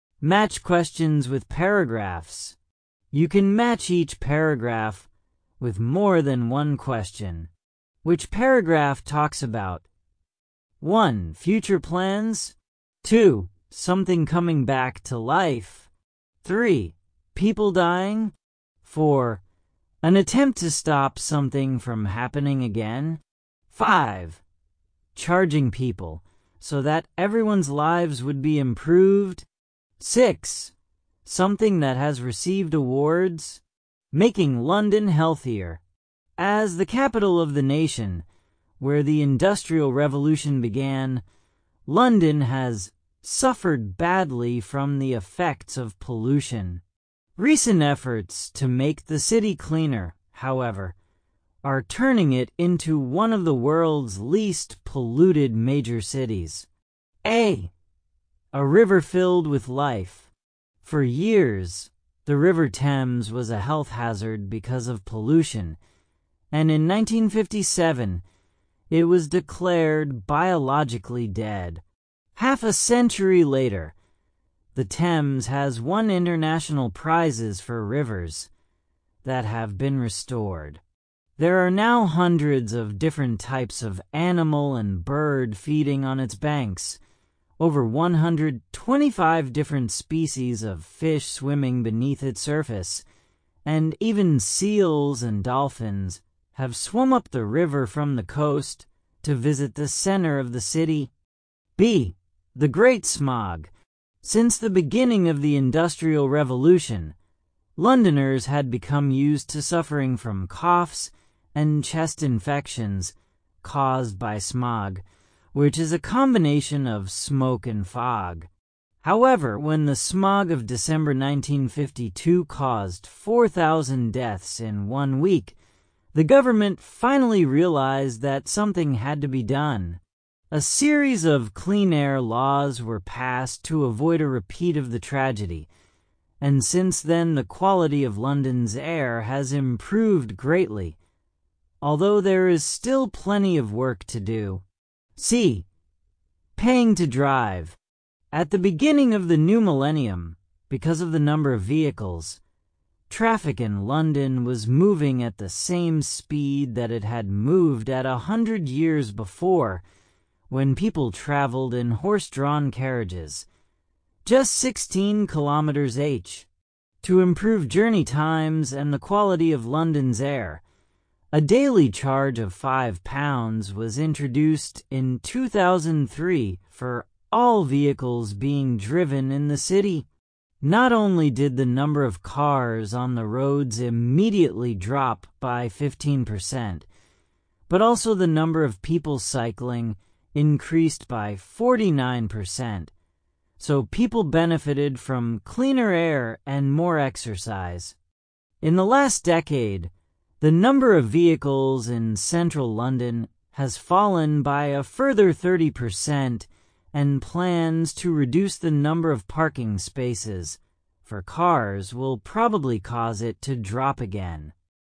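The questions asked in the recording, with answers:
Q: Future plans.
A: C: Paying to drive

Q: Something coming back to life.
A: A: A river filled with life

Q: People dying.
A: B: The Great Smog

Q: An attempt to stop something from happening again.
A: B: The Great Smog

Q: Charging people so that everyone's lives would be improved.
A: C: Paying to drive

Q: Something that has received awards.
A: A: A river filled with life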